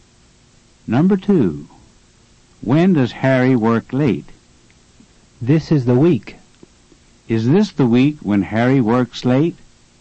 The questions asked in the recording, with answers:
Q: Is this the week when Harry works late?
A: Yes, it is.